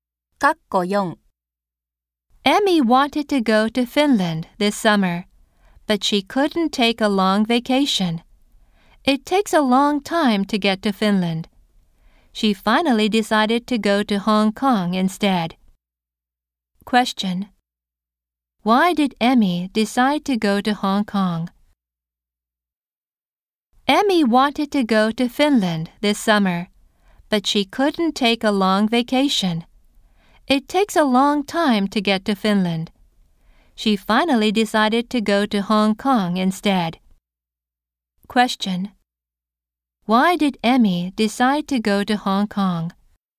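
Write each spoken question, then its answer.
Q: Why did Emmy decide to go to Hong Kong?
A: She couldn't take a long vacation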